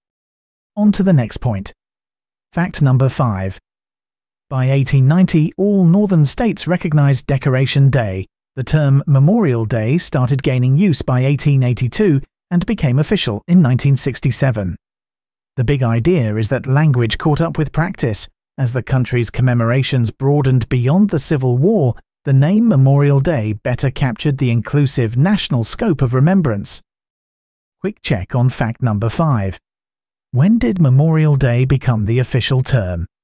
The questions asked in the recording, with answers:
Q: When did Memorial Day become the official term?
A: 1967.